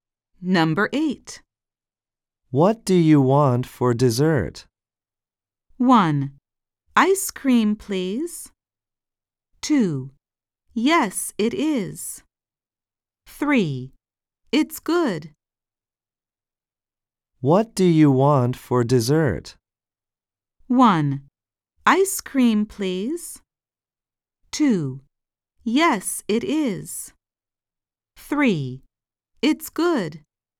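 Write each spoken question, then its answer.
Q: What do you want for dessert?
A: 1: Ice cream, please.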